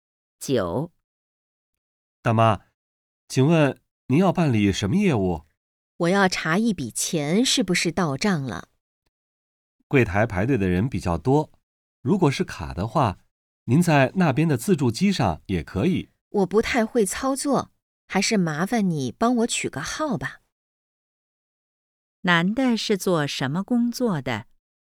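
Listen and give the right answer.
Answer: 银行柜台职员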